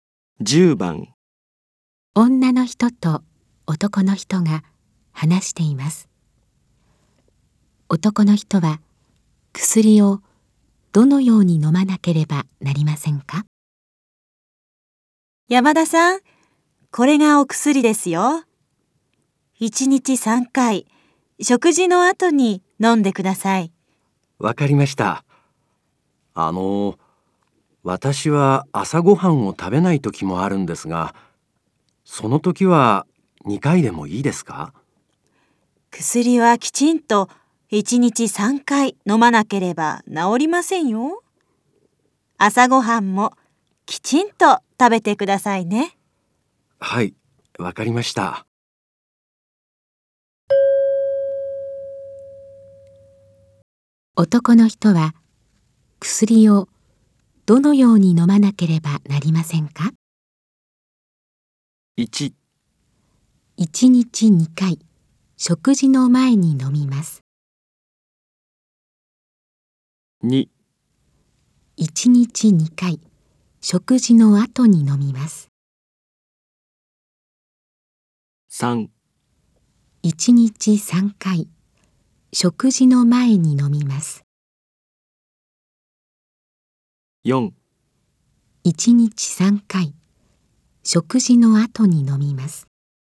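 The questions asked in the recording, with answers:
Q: 男の人は薬をどのように飲まなければなりませんか?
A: 4: 1日3回、食事の後に飲みます。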